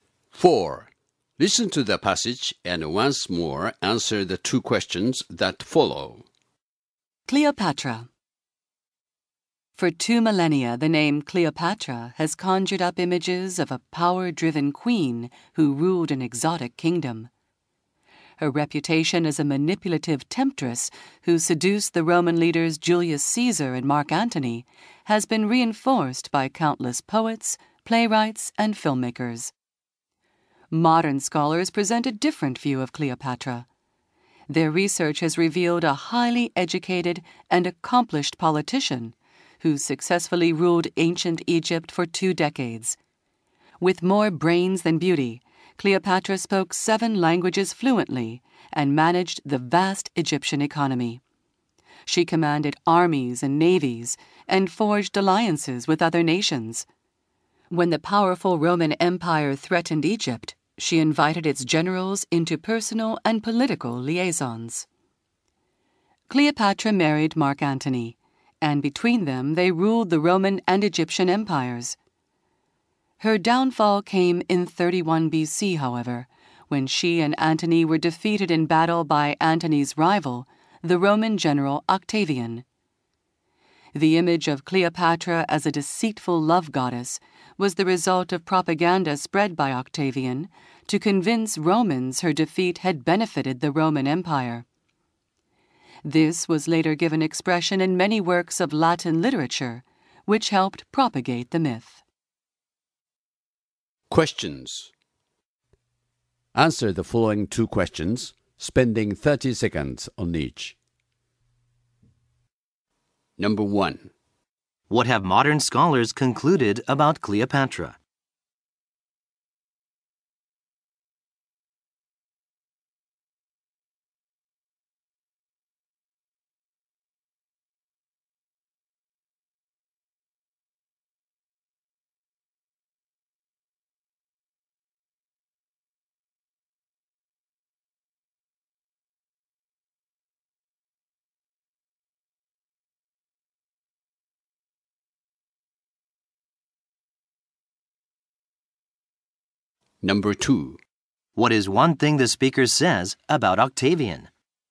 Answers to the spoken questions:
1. They have concluded that, contrary to the prevailing image of Cleopatra as a seductress, she was in fact a gifted and highly intelligent ruler.
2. Octavian engaged in a smear campaign against Cleopatra in order to validate his actions against her.